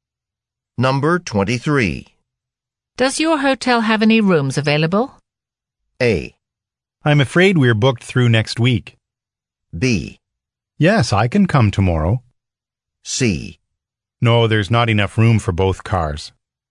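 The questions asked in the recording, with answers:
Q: Does your hotel have any rooms available?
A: A: I'm afraid we're booked through next week.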